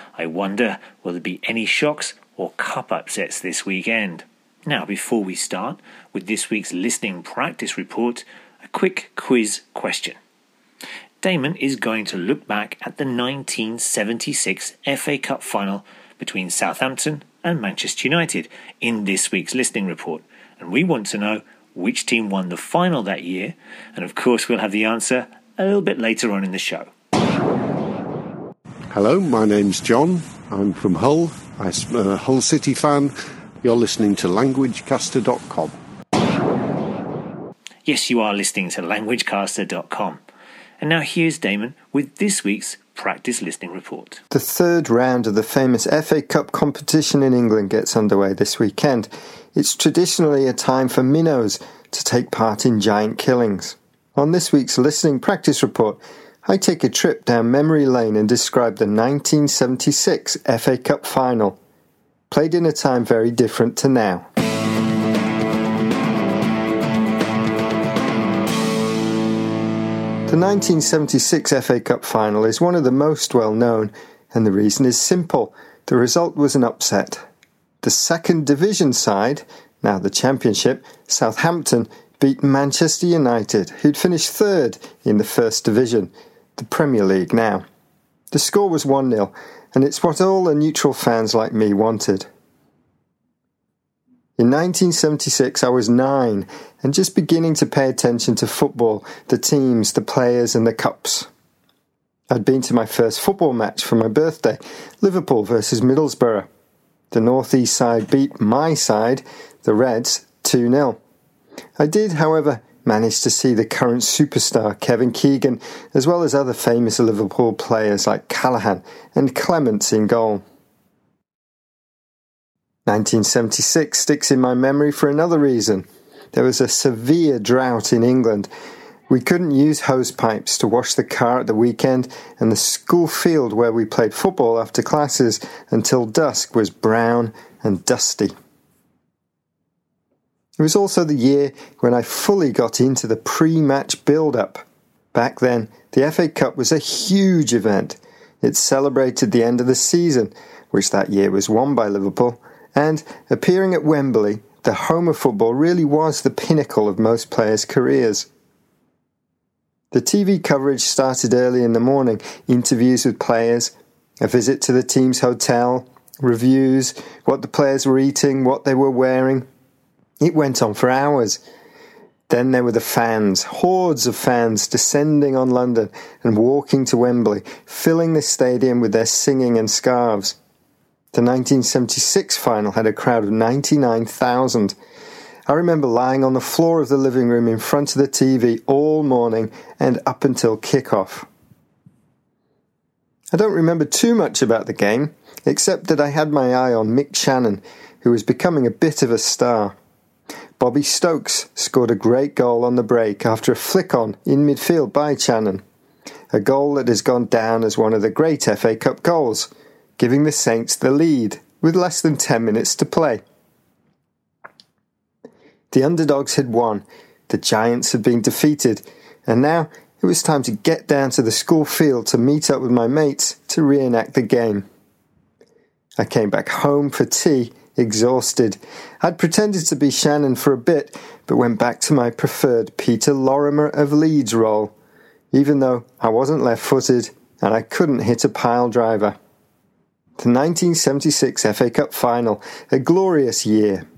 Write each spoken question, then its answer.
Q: And we want to know which team won the final that year.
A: Southampton defeated Manchester United to win the 1976 FA Cup final.